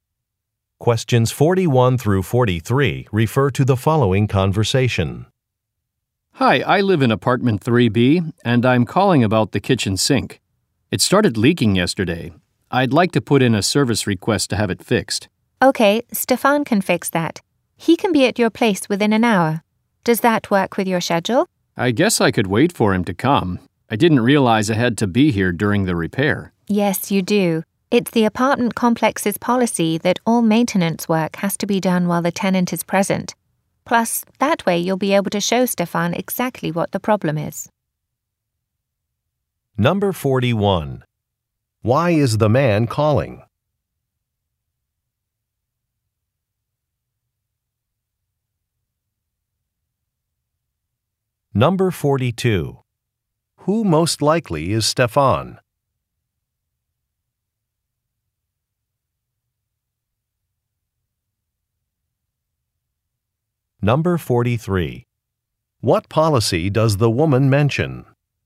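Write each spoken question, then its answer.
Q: Why is the man calling?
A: To request a repair of a leaking kitchen sink

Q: Who most likely is Stefan?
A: A maintenance worker

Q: What policy does the woman mention?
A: Tenants must be present during maintenance work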